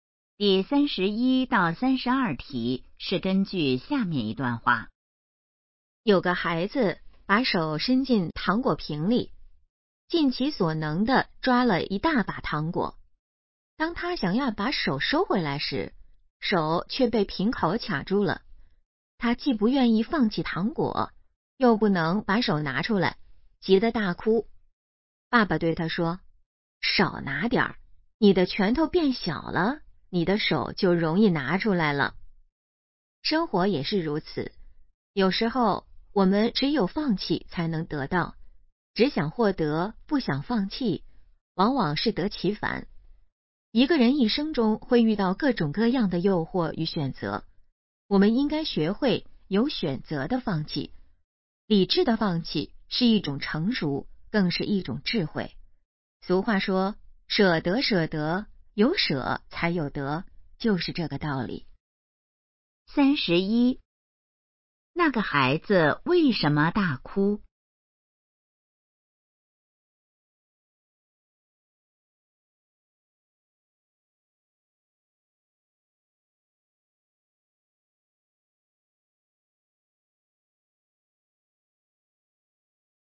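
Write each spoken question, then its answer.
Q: 那个孩子为什么大哭?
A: 手被瓶口卡住了

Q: 这段话主要想告诉我们什么?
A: 要学会有选择地放弃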